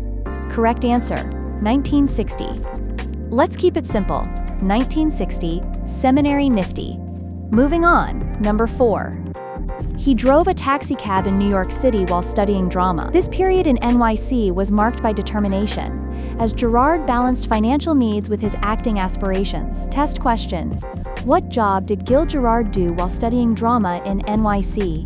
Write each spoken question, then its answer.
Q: what job did Gil Gerard do while studying drama in NYC?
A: taxi driver.